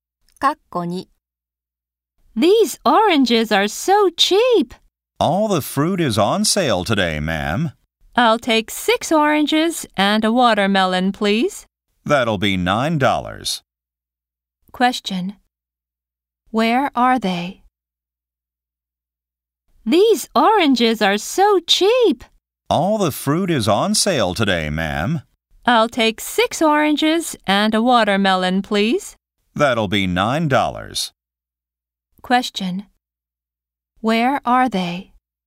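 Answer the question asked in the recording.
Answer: At a fruit shop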